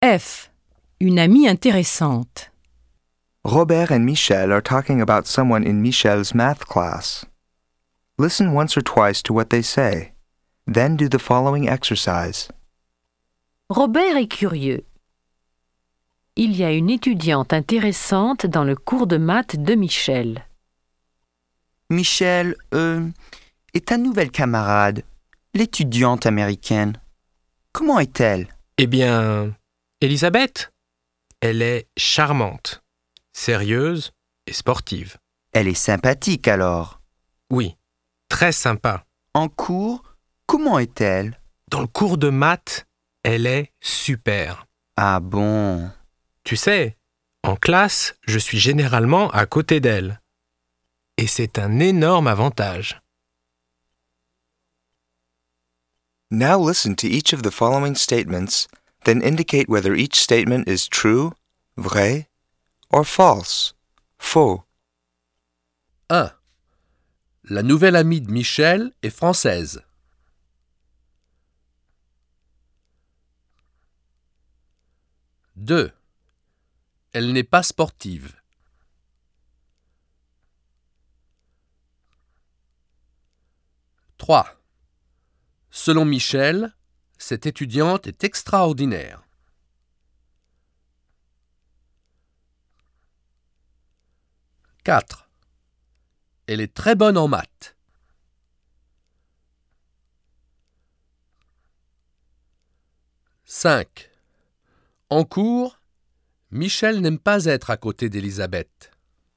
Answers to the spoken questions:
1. 1. Faux.
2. 2. Faux.
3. 3. Vrai.
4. 4. Vrai.
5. 5. Faux.